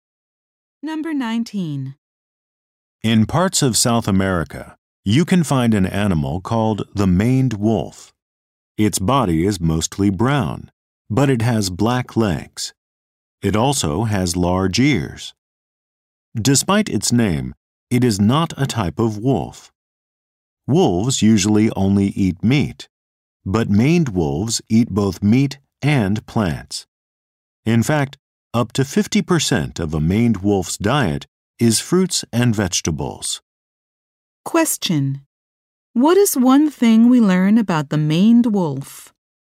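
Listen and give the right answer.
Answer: It eats both meat and plants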